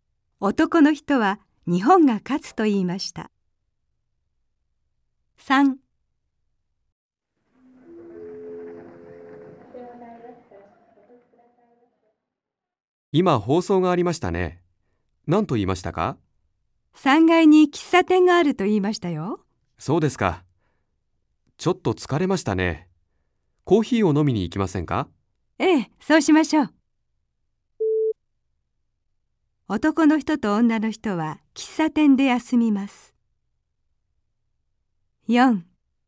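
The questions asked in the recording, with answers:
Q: 男の人と女の人は喫茶店で休みます。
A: はい(○)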